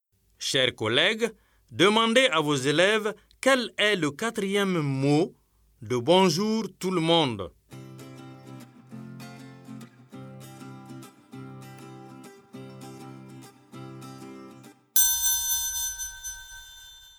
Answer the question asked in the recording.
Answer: J'espère que vos élèves ont dit monde.